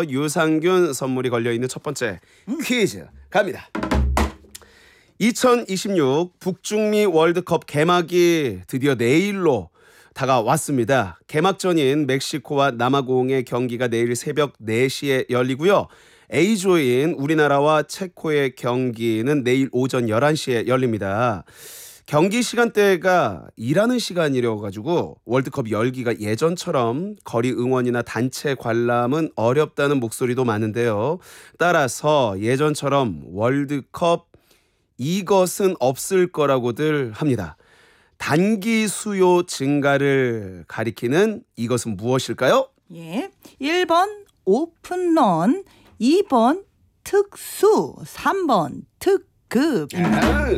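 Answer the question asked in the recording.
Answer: 2: 특수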